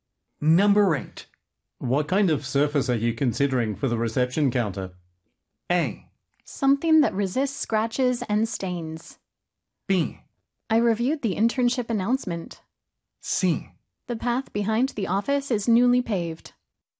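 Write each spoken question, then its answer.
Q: What kind of surface are you considering for the reception counter?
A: A: Something that resists scratches and stains.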